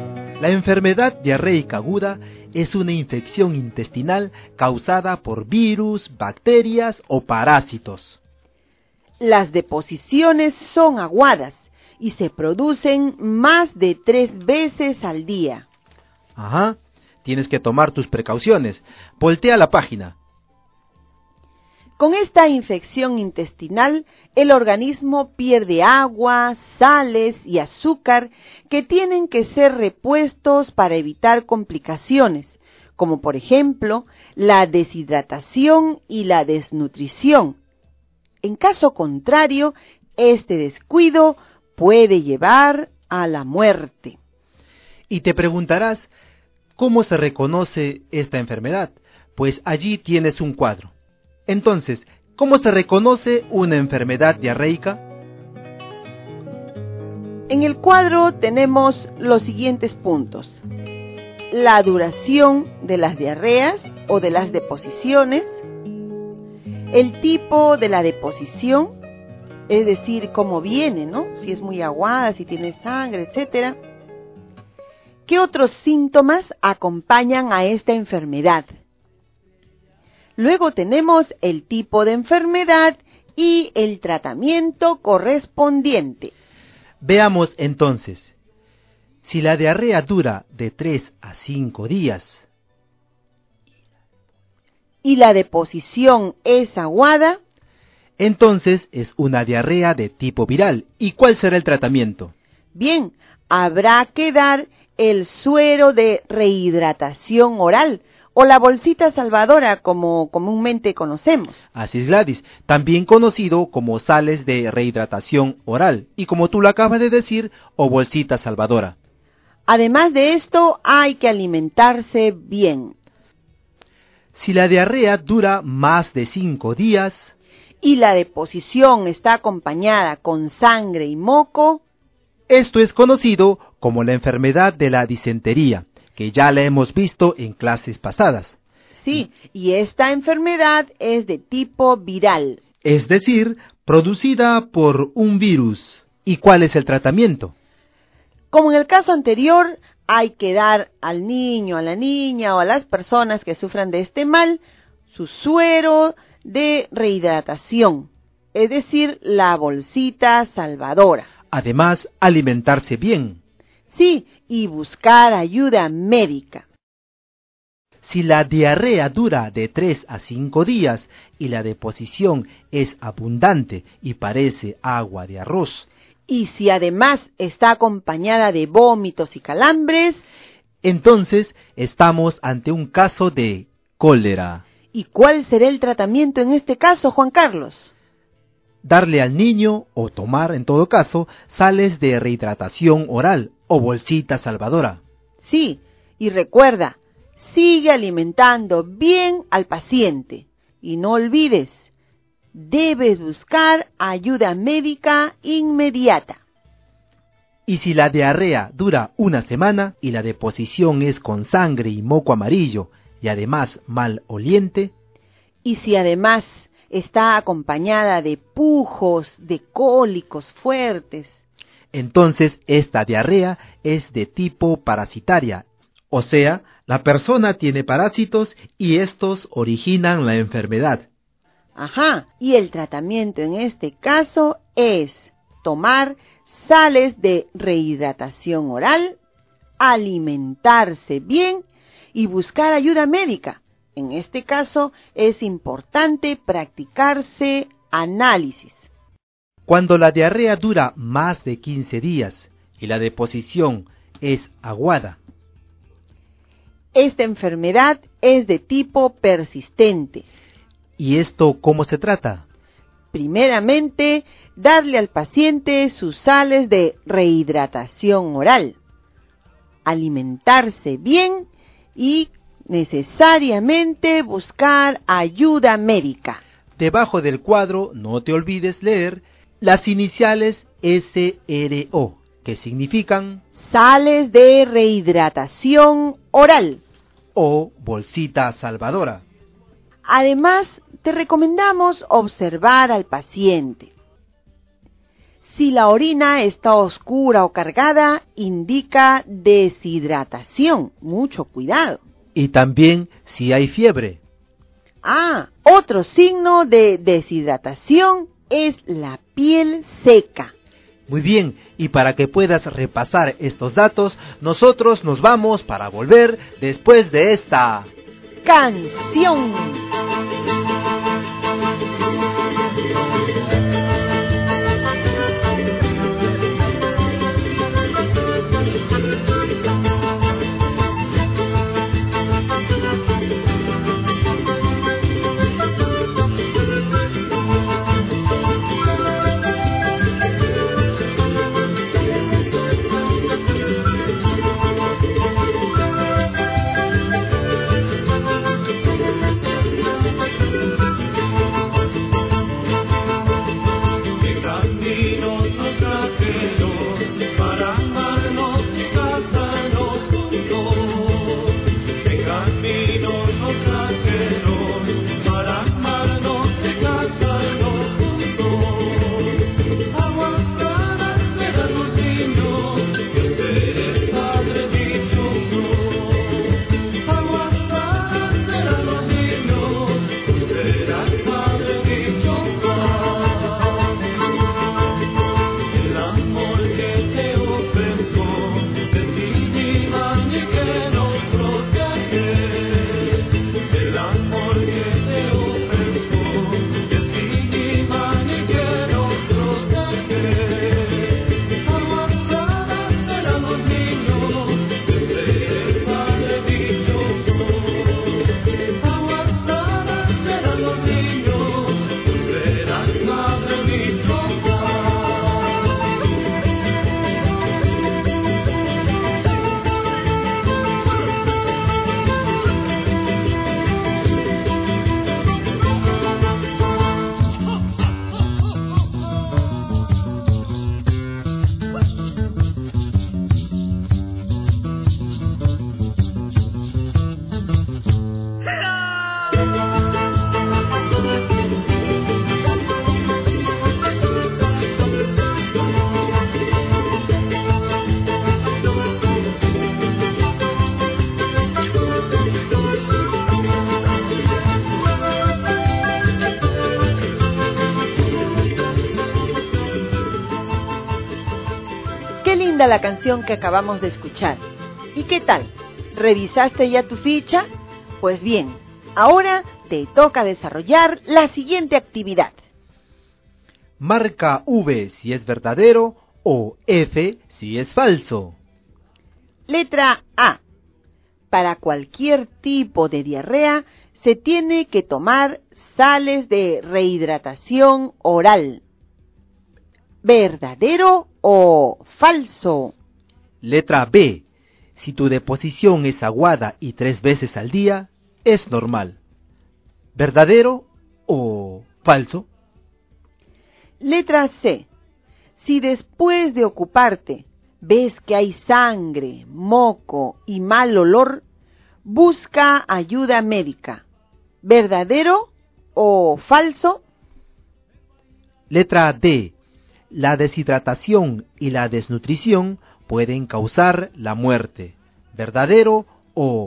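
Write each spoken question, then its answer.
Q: Letra A. Para cualquier tipo de diarrea se tiene que tomar sales de rehidratación oral.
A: Verdadero

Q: Letra C. Si después de ocuparte ves que hay sangre, moco y mal olor, busca ayuda médica.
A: Verdadero

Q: Letra D. La deshidratación y la desnutrición pueden causar la muerte. ¿Verdadero o falso?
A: Verdadero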